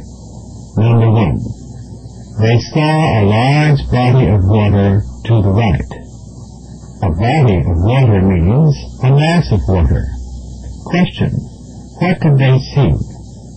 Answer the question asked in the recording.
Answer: They saw a large mass or body of water.